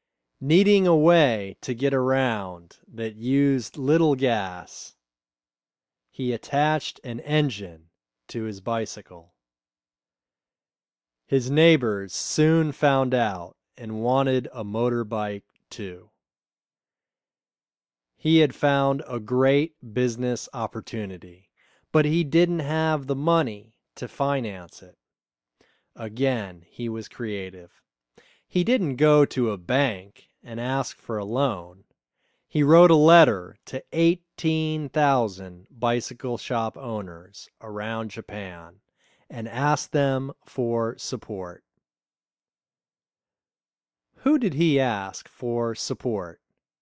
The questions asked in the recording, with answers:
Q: Who did he ask for support?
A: He asked 18,000 bicycle shop owners for support.